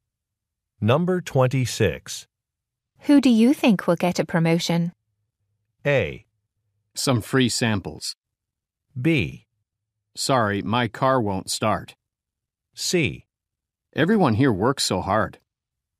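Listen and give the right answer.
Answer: C: Everyone here works so hard.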